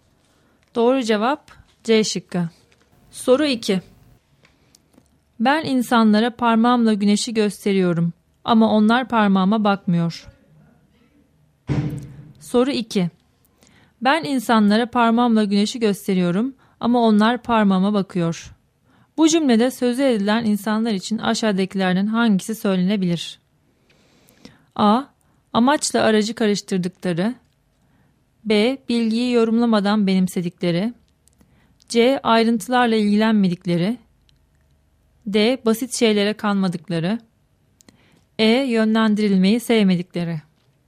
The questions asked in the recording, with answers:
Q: Bu cümlede sözü edilen insanlar için aşağıdakilerden hangisi söylenebilir?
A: Doğru cevap A şıkkı.